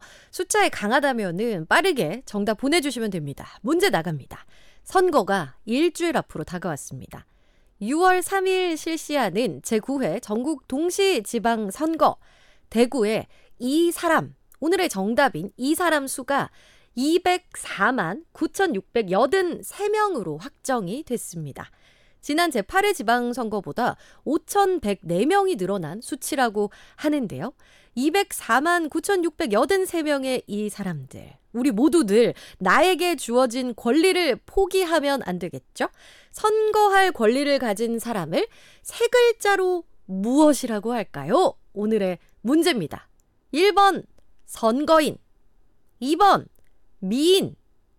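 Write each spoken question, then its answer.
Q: 선거할 권리를 가진 사람을 세 글자로 무엇이라고 할까요?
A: 1: 선거인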